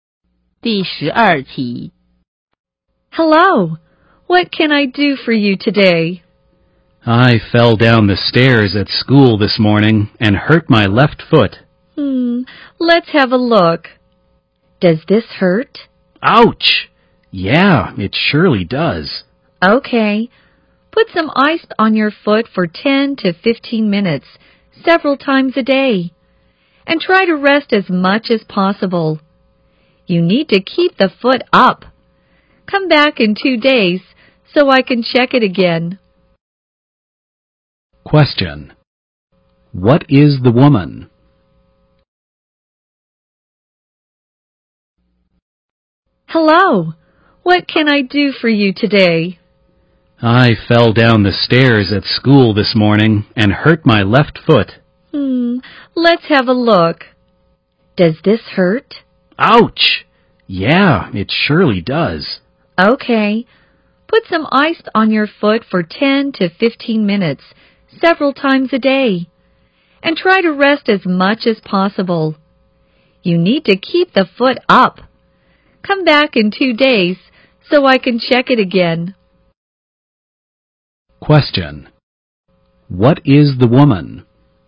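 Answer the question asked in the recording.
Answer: A doctor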